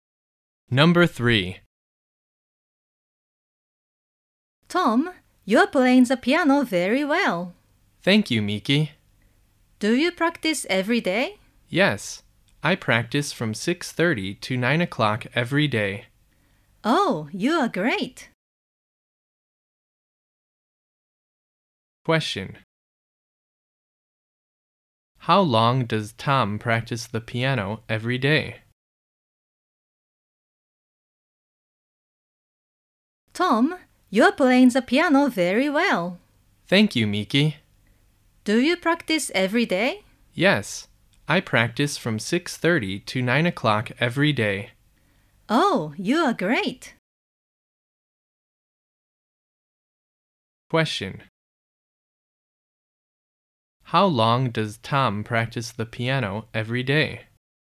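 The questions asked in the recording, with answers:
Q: How long does Tom practice the piano every day?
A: Two and a half hours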